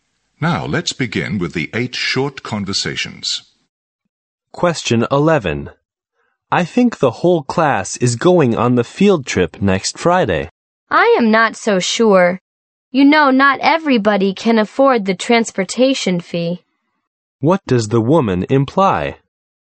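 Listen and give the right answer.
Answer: Not everyone may go on the field trip, since some can't afford the transportation fee.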